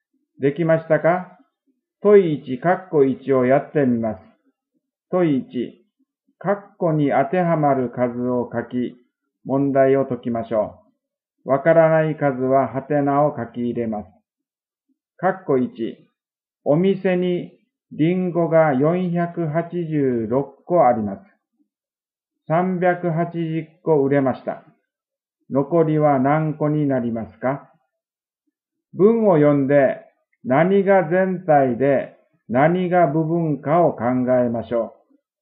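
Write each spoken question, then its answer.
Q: お店にリンゴが486個あります。380個売れました。残りは何個になりますか?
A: 106個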